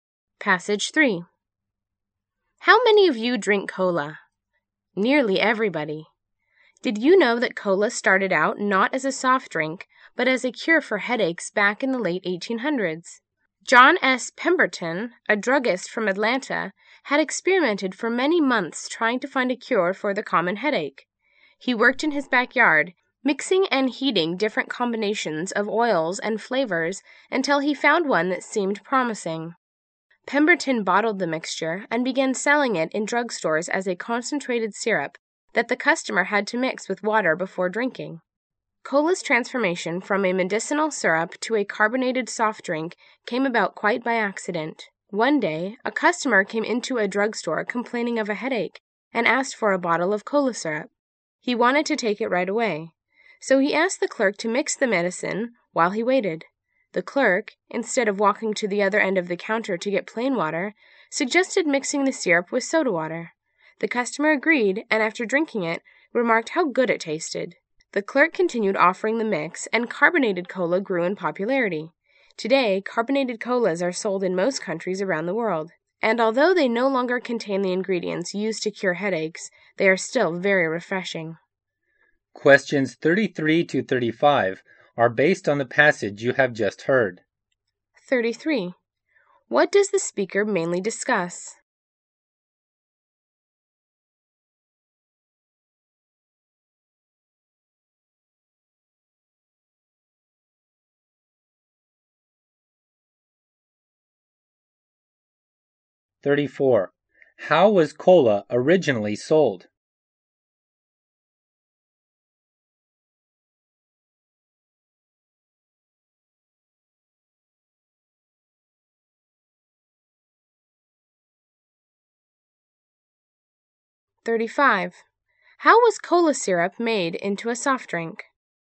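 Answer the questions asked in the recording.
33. The origin of cola
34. As a concentrated syrup in drugstores, a headache cure
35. A clerk mixed it with soda water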